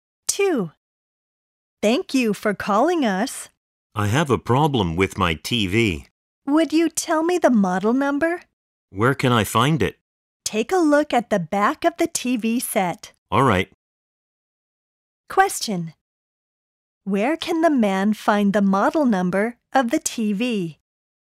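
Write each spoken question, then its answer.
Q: Where can the man find the model number of the TV?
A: On the back of the TV set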